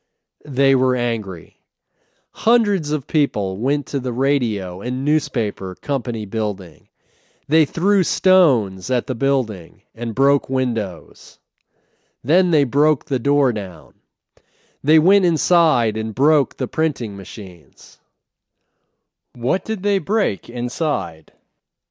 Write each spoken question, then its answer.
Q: What did they break inside?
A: They broke the printing machines.